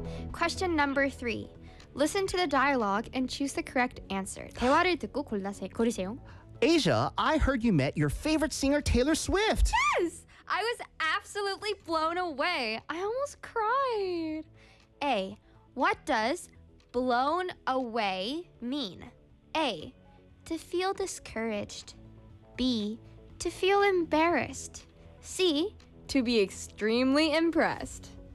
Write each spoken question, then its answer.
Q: What does blown away mean?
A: C입니다.